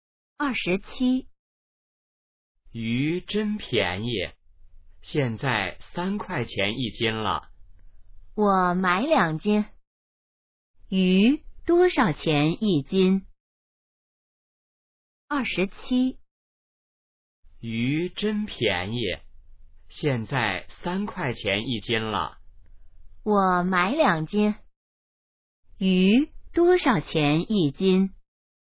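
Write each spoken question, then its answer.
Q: 鱼多少钱一斤?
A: 3块钱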